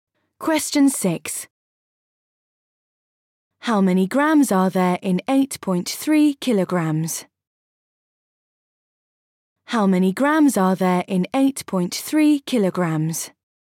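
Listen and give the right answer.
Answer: 8300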